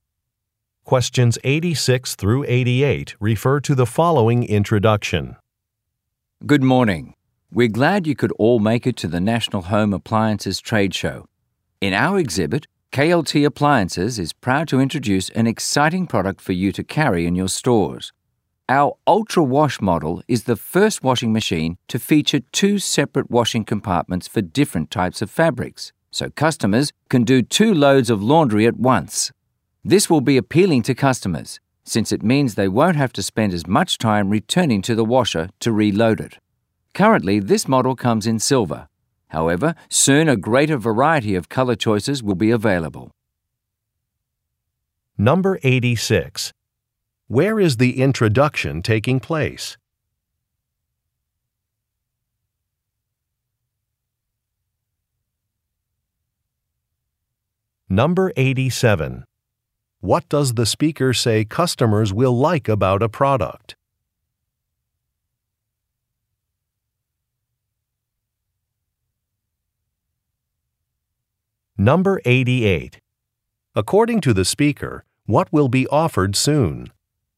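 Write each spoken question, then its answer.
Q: Where is the introduction taking place?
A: At a home appliances trade show

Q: What does the speaker say customers will like about a product?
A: It saves time by washing two loads at once

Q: According to the speaker, what will be offered soon?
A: More color choices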